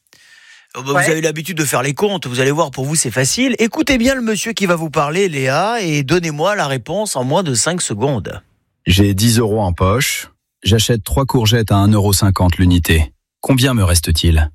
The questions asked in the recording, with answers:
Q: J'ai 10 euros en poche, j'achète 3 courgettes à 1,50€ l'unité. Combien me reste-t-il?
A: Il me reste donc 5,50€.